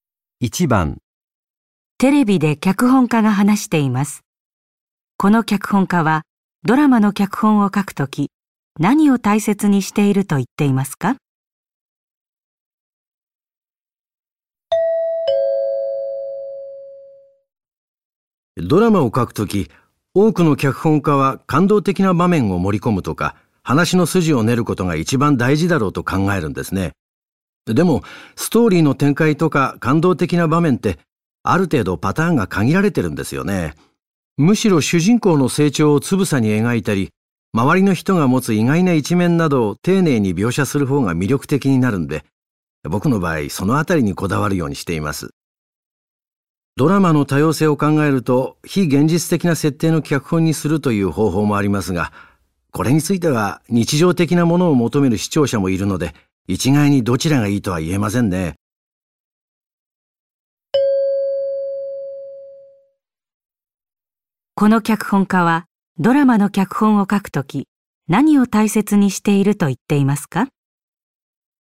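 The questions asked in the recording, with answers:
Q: この脚本家はドラマの脚本を書くとき何を大切にしていると言っていますか?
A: 登場人物(主人公の成長や周りの人の意外な一面)を丁寧に描くこと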